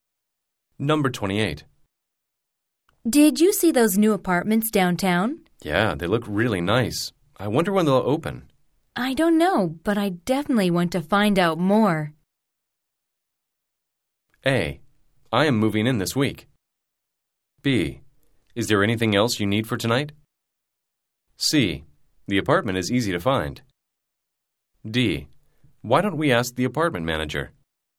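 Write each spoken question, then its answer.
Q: I don't know, but I definitely want to find out more.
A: D: Why don't we ask the apartment manager?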